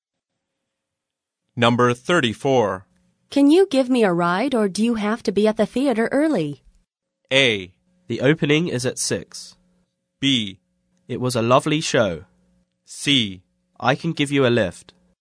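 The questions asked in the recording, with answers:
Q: Can you give me a ride or do you have to be at the theater early?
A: C: I can give you a lift.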